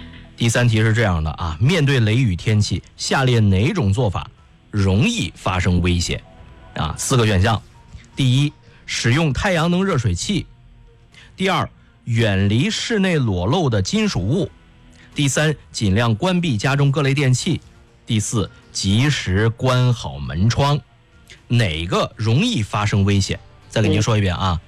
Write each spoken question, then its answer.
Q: 面对雷雨天气,下列哪种做法容易发生危险?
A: 第一个,使用太阳能热水器容易发生危险,确定吗?